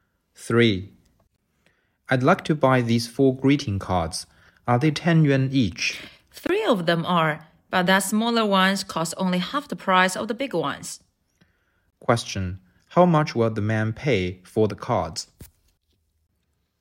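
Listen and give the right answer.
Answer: 35 yuan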